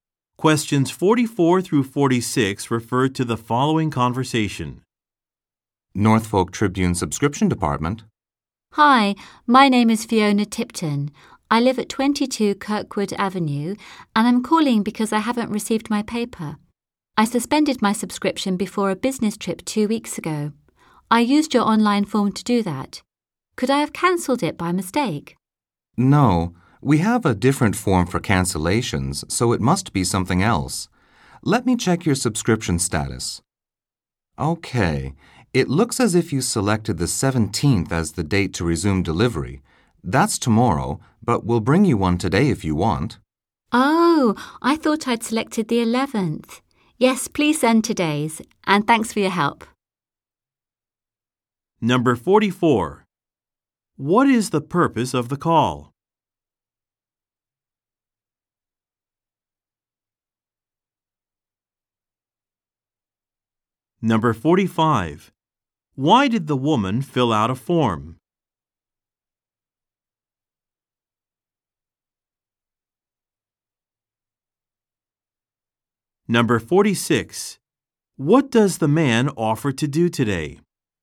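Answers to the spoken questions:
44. She has not received her newspaper
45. To suspend her subscription before a business trip
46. Deliver today's paper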